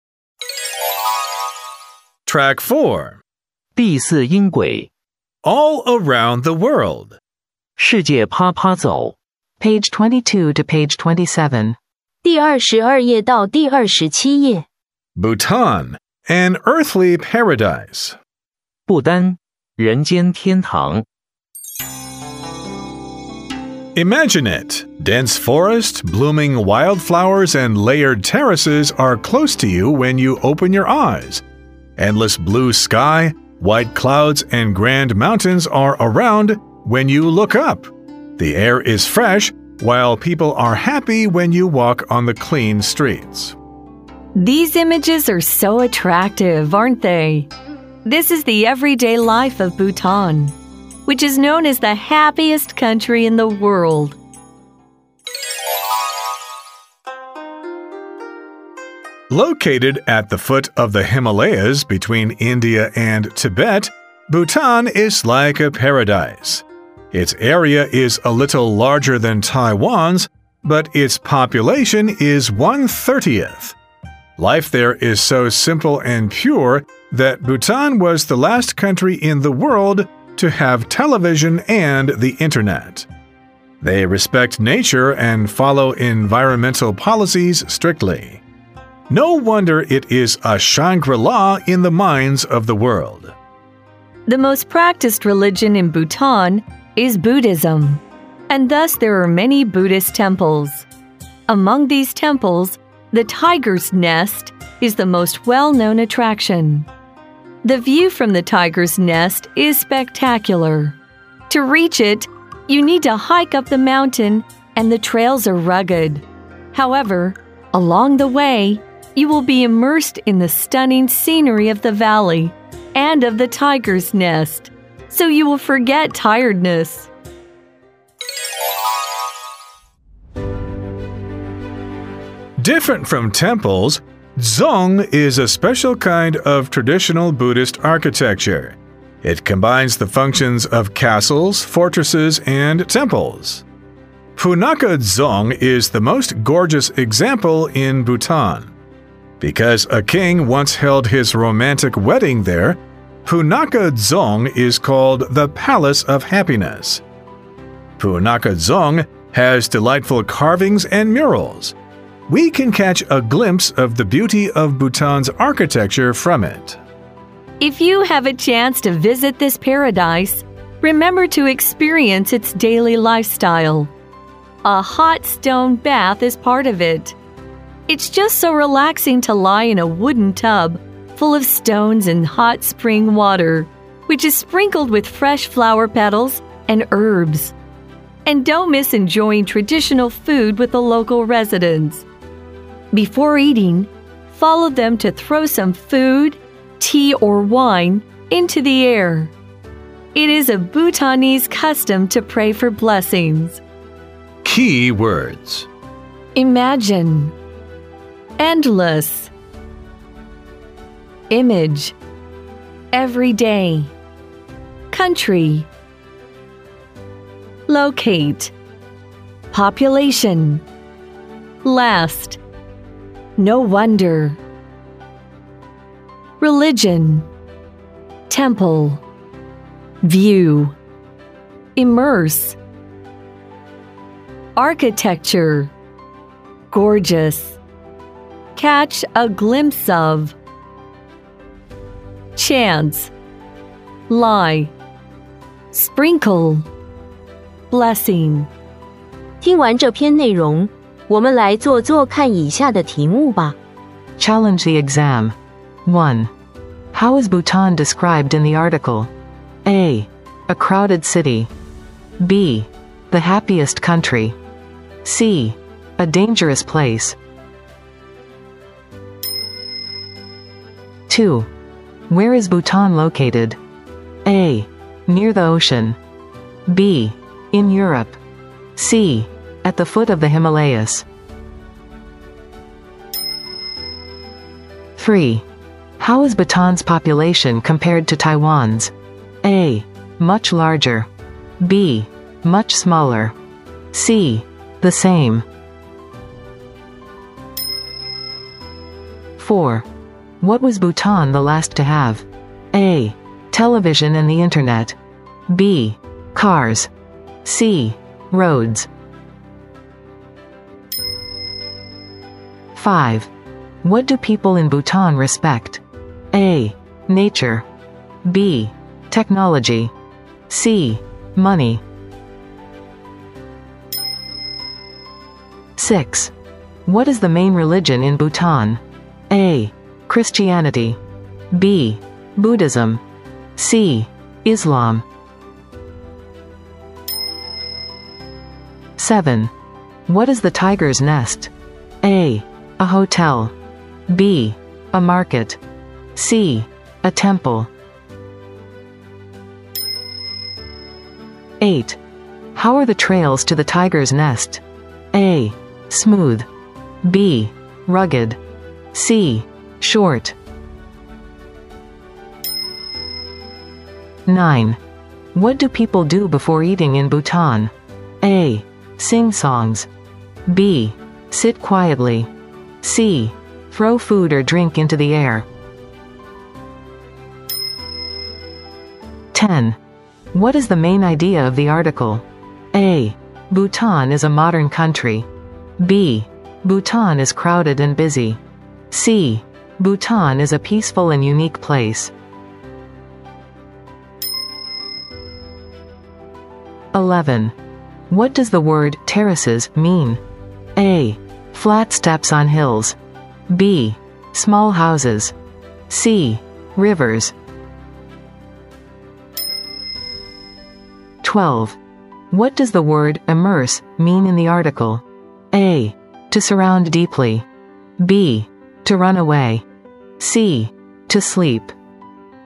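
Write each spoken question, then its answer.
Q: How is Bhutan described in the article?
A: B: The happiest country.

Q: Where is Bhutan located?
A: C: At the foot of the Himalayas.

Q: How is Bhutan's population compared to Taiwan's?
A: B: Much smaller.

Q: What was Bhutan the last to have?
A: A: Television and the internet.

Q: What do people in Bhutan respect?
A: A: Nature.

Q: What is the main religion in Bhutan?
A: B: Buddhism.

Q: What is the tiger's nest?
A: C: A temple.

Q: How are the trails to the tiger's nest?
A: B: Rugged.

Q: What do people do before eating in Bhutan?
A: C: Throw food or drink into the air.

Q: What is the main idea of the article?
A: C: Bhutan is a peaceful and unique place.

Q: What does the word terraces mean?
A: A: Flat steps on hills.

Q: What does the word immerse mean in the article?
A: A: To surround deeply.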